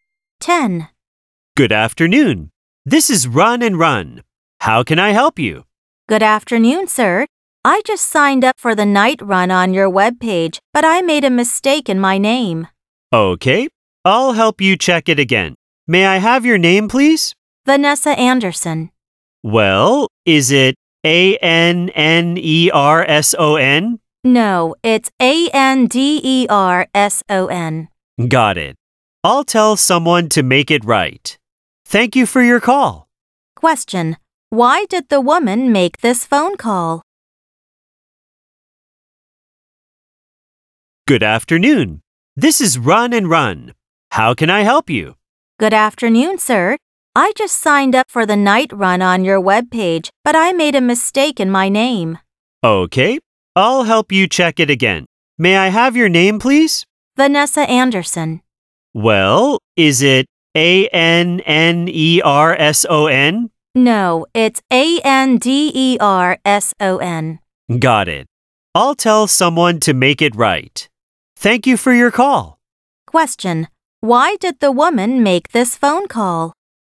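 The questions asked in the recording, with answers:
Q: Why did the woman make this phone call?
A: To correct a mistake in her name for the night run sign-up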